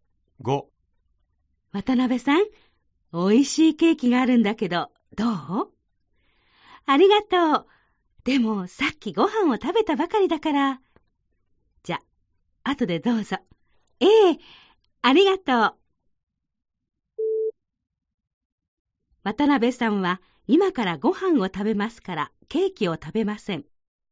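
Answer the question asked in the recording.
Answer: ×(さっきご飯を食べたばかり)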